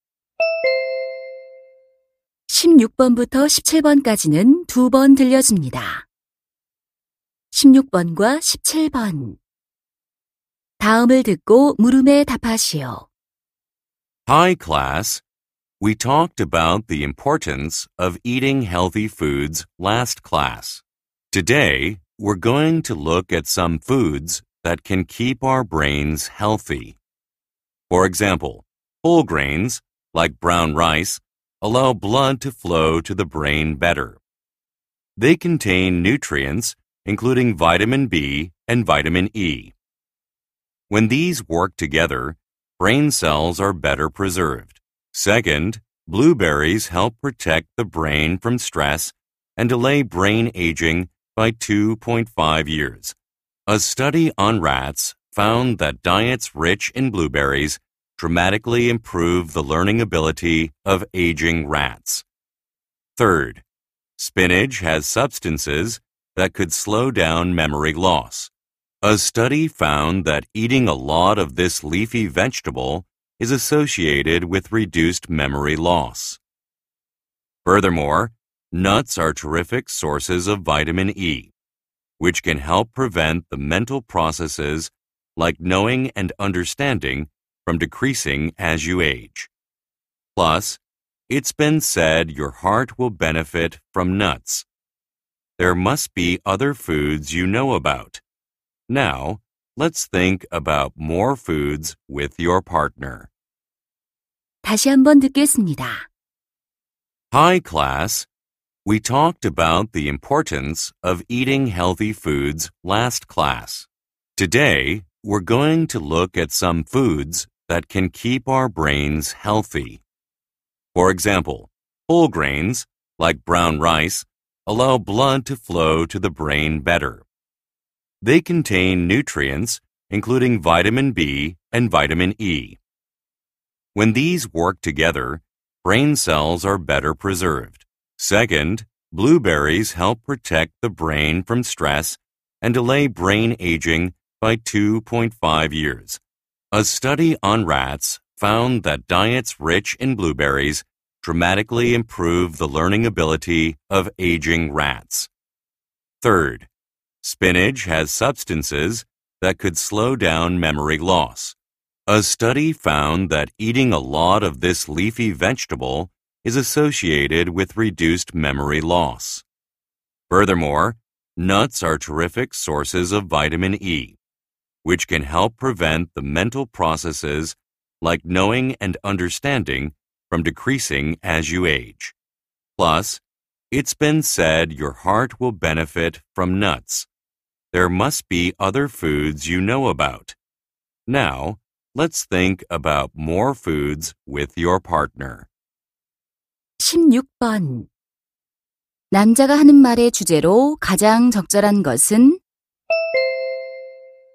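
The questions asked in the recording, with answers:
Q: 남자가 하는 말의 주제로 가장 적절한 것은?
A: 뇌 건강에 좋은 음식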